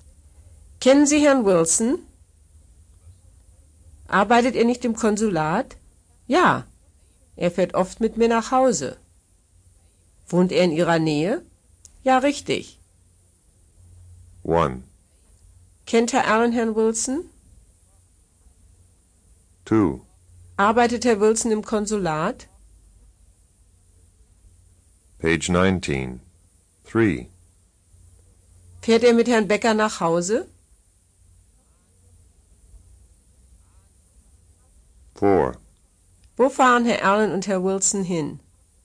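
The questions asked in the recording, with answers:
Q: Arbeitet Herr Wilson im Konsulat?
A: Ja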